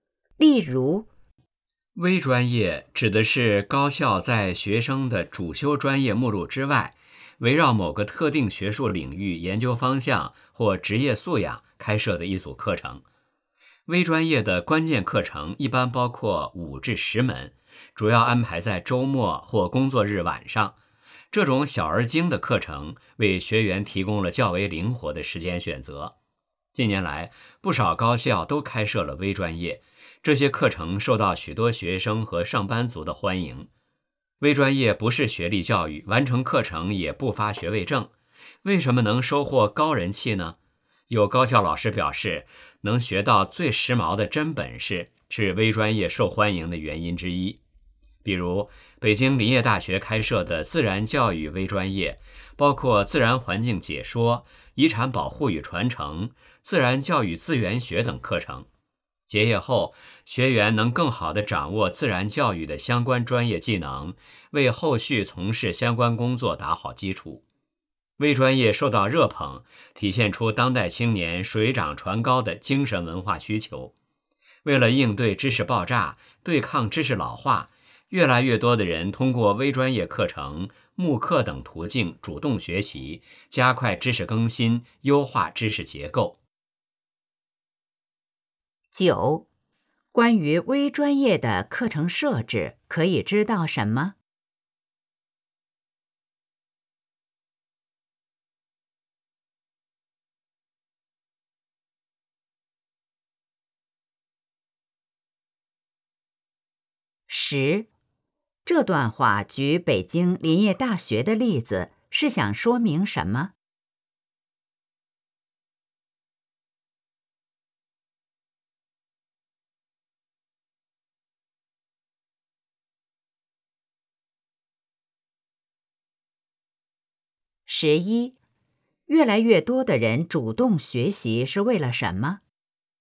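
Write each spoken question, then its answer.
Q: 关于微专业的课程设置,可以知道什么?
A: 关键课程一般五至十门,主要安排在周末或工作日晚上,时间灵活

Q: 这段话举北京林业大学的例子,是想说明什 么?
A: 微专业能学到最时髦的真本事

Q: 越来越多的人主动学习是为了什么?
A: 应对知识爆炸,对抗知识老化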